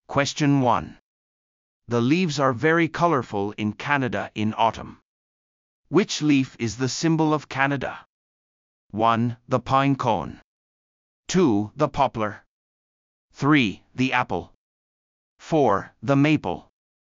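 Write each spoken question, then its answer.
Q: Which leaf is the symbol of Canada?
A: 4: The maple.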